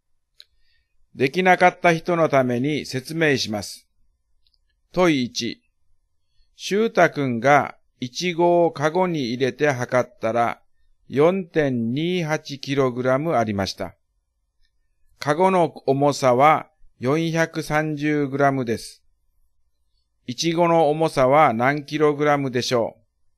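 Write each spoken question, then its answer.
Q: イチゴの重さは何 kg でしょう?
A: 3.85kg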